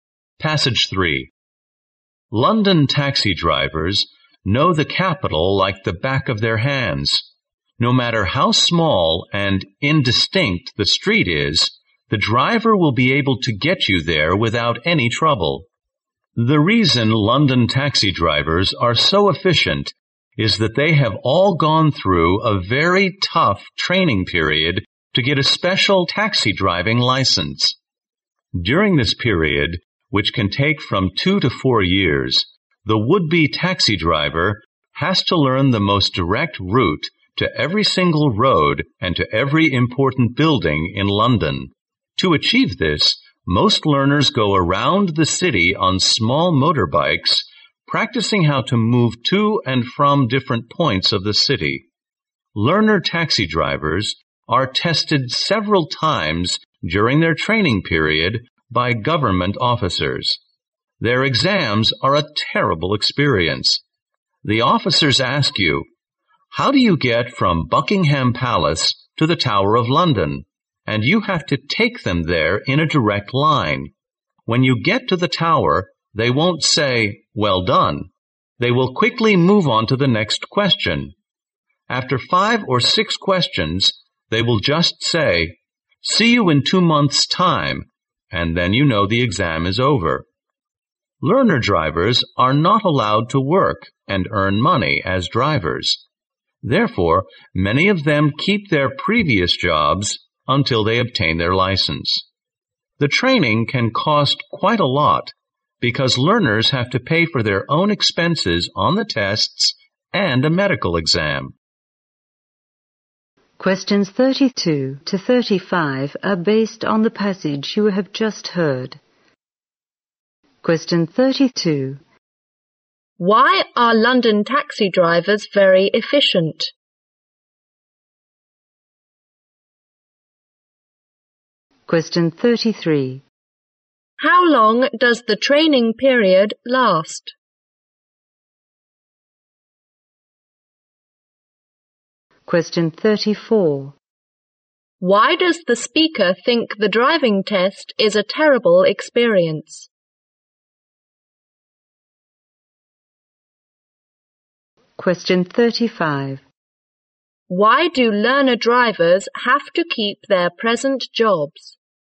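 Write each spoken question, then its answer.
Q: Why are London taxi drivers very efficient?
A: They go through very tough training to get a special license.

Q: How long does the training period last?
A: 2 to 4 years.

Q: Why do learner drivers have to keep their present jobs?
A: They are not allowed to work and earn money as drivers until licensed.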